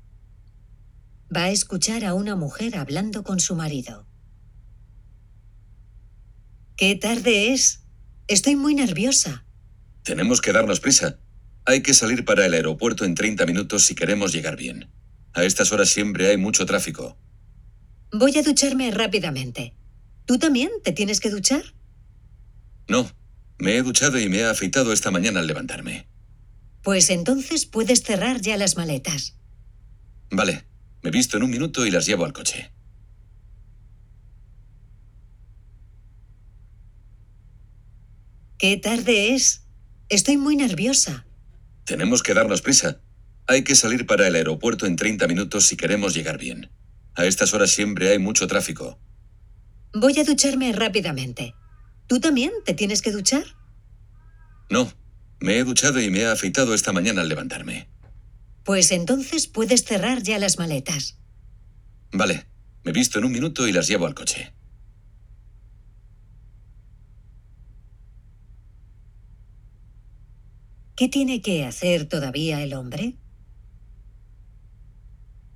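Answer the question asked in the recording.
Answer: Vestirse, cerrar las maletas y llevarlas al coche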